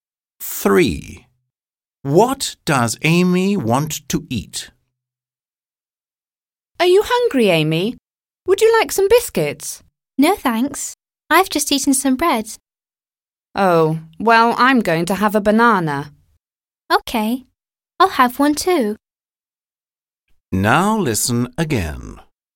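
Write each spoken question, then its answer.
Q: What does Amy want to eat?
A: A banana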